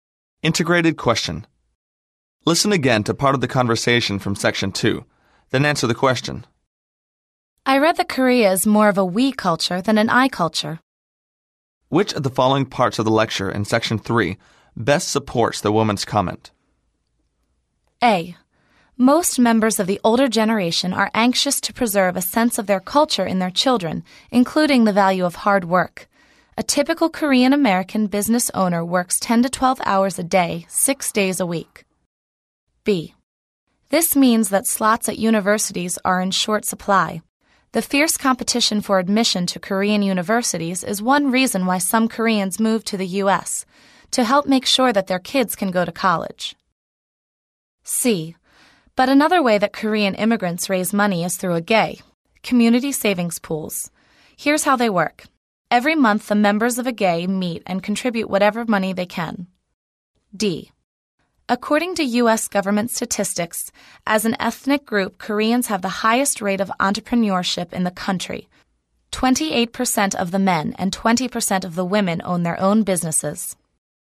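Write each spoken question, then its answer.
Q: Which of the following parts of the lecture in section 3 best supports the woman's comment?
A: C: But another way that Korean immigrants raise money is through a GAE, community savings pools.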